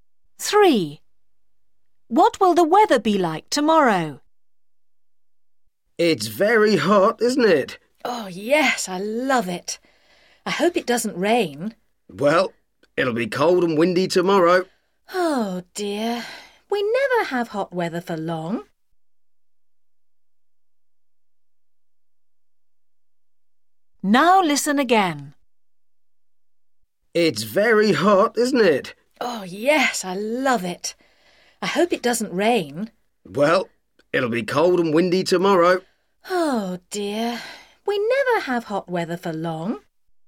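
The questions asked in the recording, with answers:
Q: What will the weather be like tomorrow?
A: cold and windy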